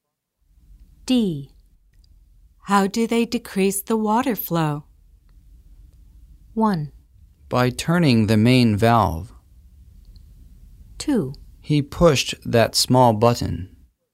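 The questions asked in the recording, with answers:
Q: How do they decrease the water flow?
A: 1: By turning the main valve.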